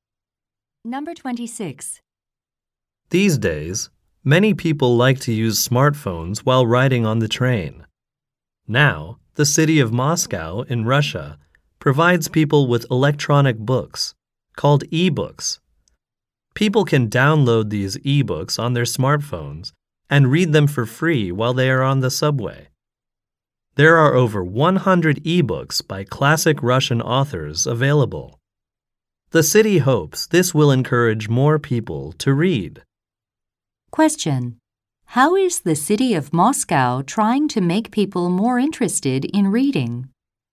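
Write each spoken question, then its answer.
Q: How is the city of Moscow trying to make people more interested in reading?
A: By providing free e-books to read on the subway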